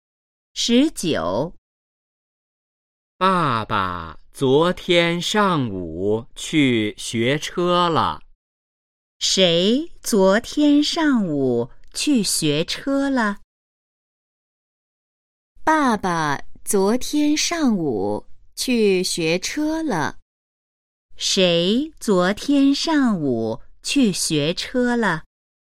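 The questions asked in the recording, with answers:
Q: 谁昨天上午去学车了?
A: 爸爸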